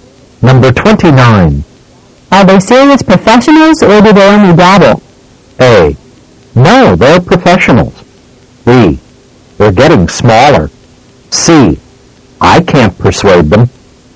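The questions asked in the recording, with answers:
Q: Are they serious professionals or do they only dabble?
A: A: No, they're professionals.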